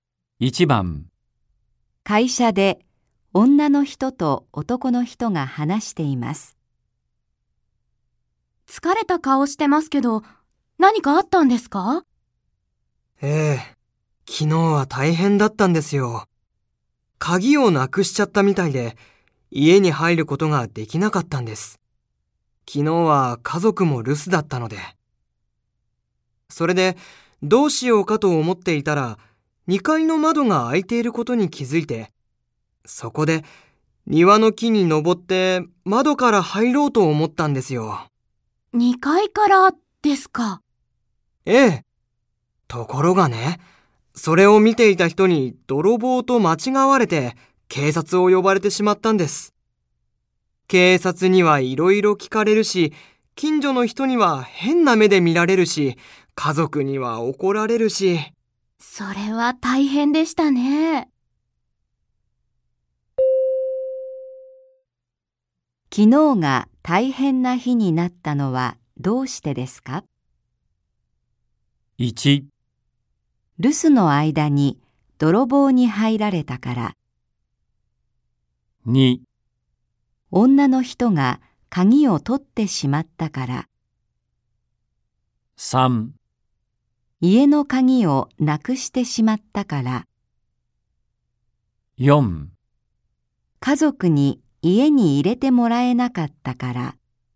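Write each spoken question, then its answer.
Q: 昨日が大変な日になったのはどうしてですか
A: 3: 家の鍵をなくしてしまったから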